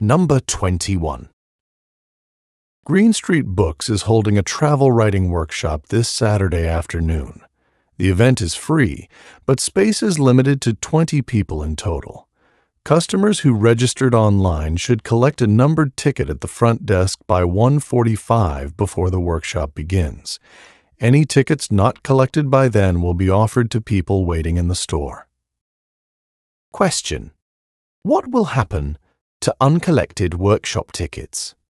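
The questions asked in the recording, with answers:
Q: What will happen to uncollected workshop tickets?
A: They will be offered to people waiting in the store.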